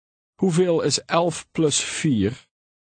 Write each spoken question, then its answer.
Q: Hoeveel is 11 plus 4?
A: 15.